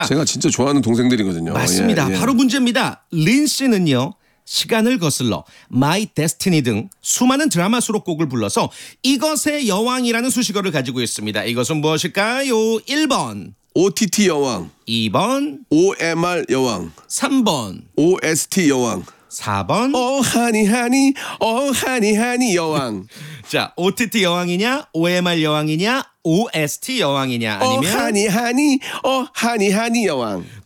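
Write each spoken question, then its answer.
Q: 이것은 무엇일까요?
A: 3: OST 여왕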